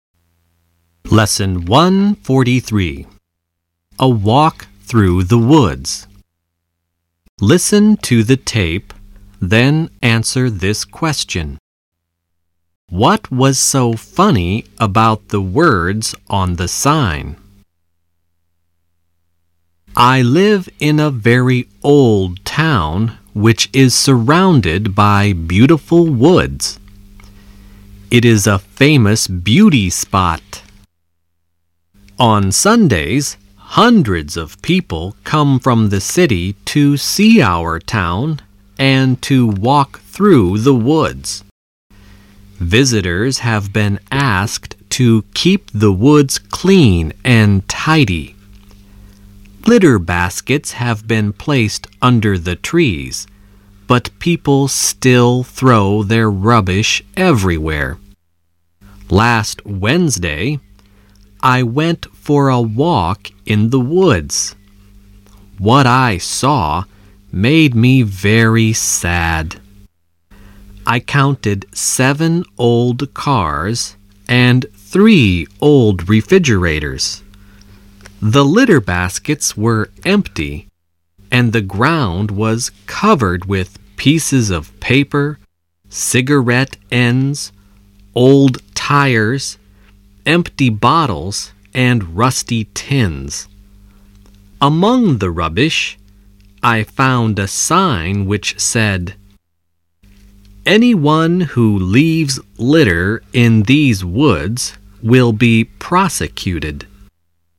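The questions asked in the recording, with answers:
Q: What was so funny about the words on the sign?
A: The sign warning that litter-droppers would be prosecuted was itself lying among the rubbish.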